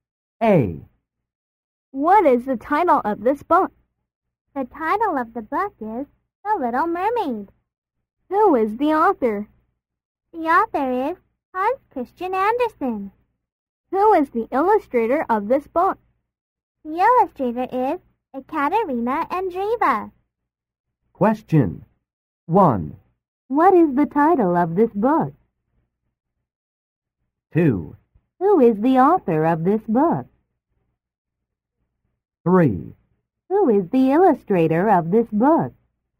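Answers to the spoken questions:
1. The Little Mermaid
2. Hans Christian Andersen
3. Ekaterina Andreeva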